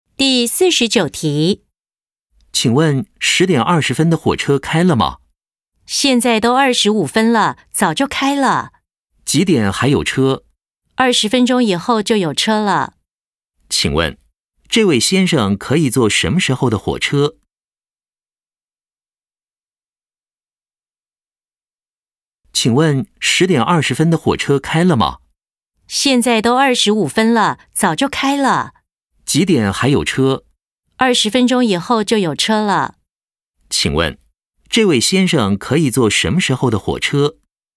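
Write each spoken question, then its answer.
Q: 请问,这位先生可以坐什么时候的火车?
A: 10:45的火车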